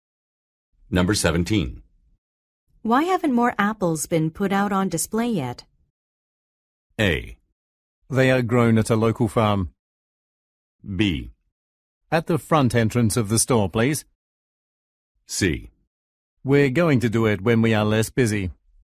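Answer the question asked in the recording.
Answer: C: We're going to do it when we are less busy.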